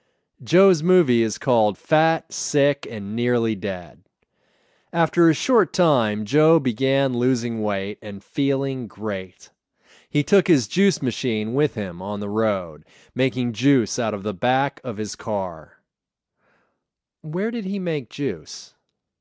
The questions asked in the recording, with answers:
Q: Where did he make juice?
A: He made juice on the road out of the back of his car.